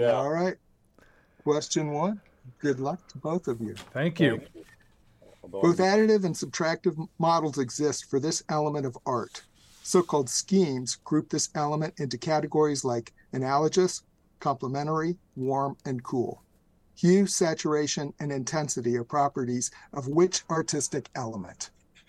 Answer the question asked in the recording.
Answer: Color.